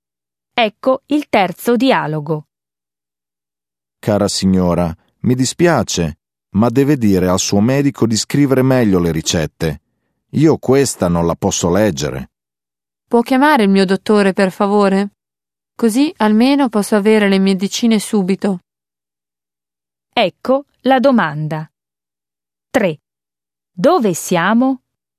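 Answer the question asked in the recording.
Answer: In farmacia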